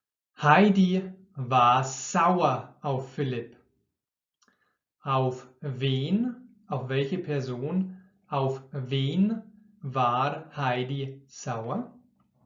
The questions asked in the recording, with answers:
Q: Auf wen, auf welche Person, auf wen war Heidi sauer?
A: Auf Philipp. Heidi war auf Philipp sauer.